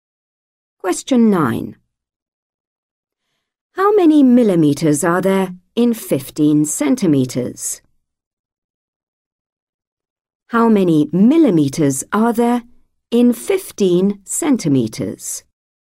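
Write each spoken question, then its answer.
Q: How many millimetres are there in 15 centimetres?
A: 150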